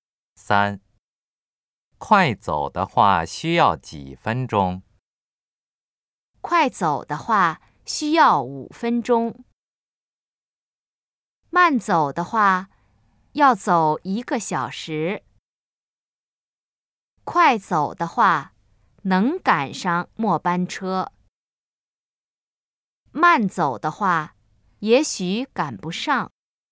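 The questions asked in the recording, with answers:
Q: 快走的话需要几分钟?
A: A: 快走的话需要5分钟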